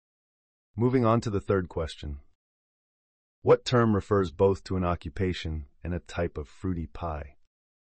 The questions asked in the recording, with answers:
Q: What term refers both to an occupation and a type of fruity pie?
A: The answer is a cobbler.